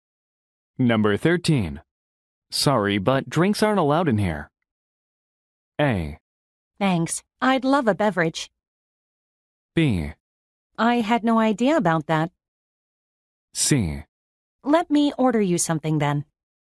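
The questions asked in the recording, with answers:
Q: Sorry, but drinks aren't allowed in here.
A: B: I had no idea about that.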